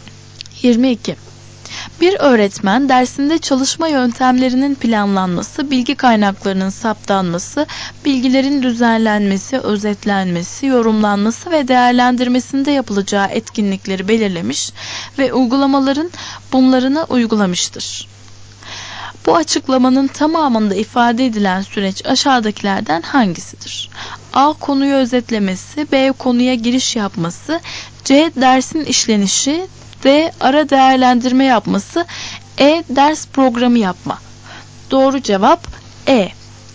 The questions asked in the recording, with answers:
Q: Bu açıklamanın tamamında ifade edilen süreç aşağıdakilerden hangisidir?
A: Doğru cevap E.